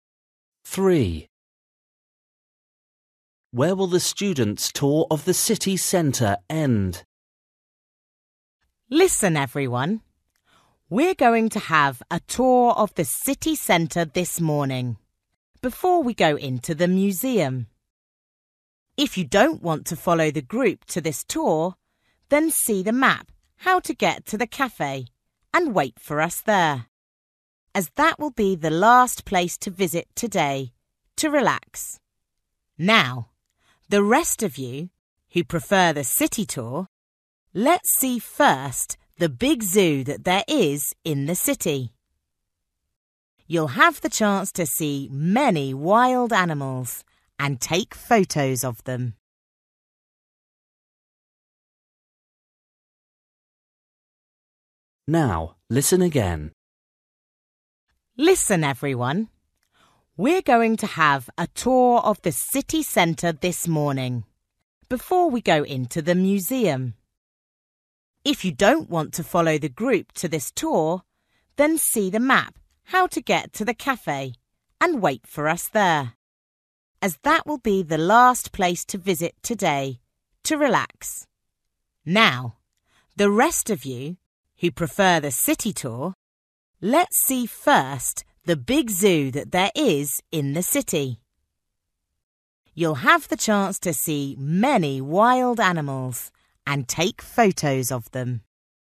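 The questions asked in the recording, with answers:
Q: Where will the students' tour of the city centre end?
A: at the cafe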